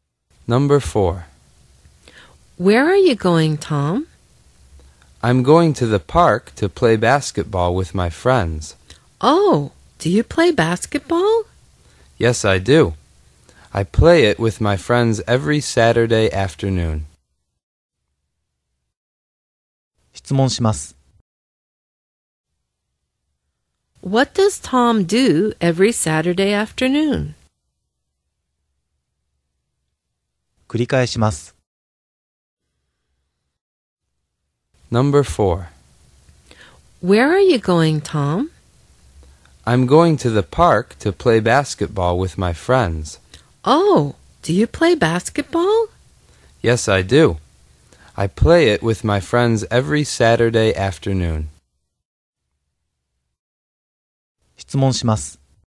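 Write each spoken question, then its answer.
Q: What does Tom do every Saturday afternoon?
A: He plays basketball with his friends.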